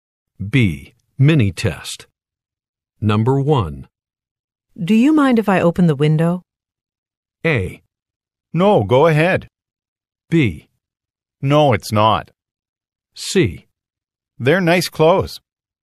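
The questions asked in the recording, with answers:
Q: Do you mind if I open the window?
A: A: No, go ahead.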